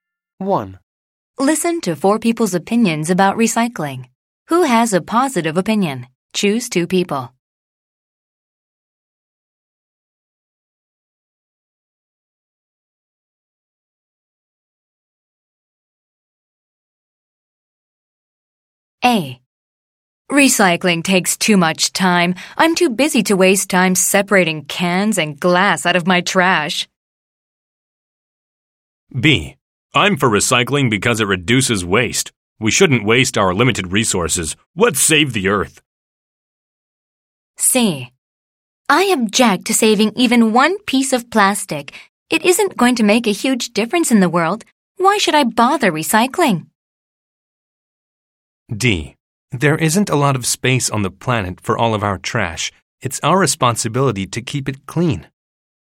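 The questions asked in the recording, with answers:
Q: Who has a positive opinion?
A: B: I'm for recycling because it reduces waste; D: There isn't a lot of space on the planet for all of our trash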